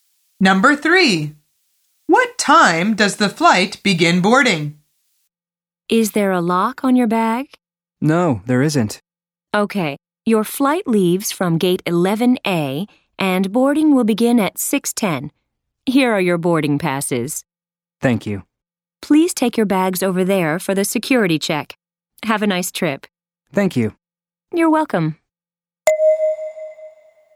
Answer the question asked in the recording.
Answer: The answer is 6:10 p.m.